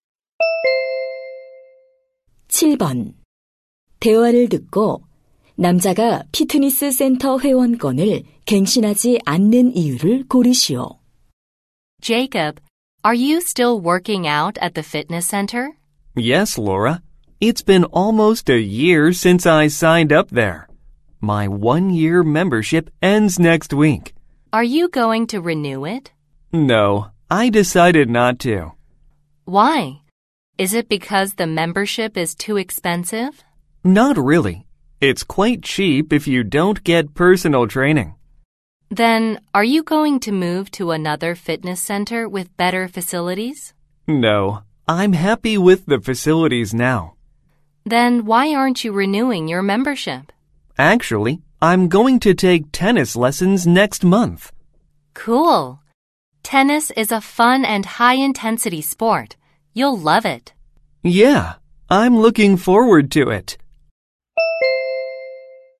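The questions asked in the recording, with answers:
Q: 대화를 듣고 남자가 피트니스 센터 회원권을 갱신하지 않는 이유를 고르시오.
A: 다음 달에 테니스 레슨을 받을 예정이라서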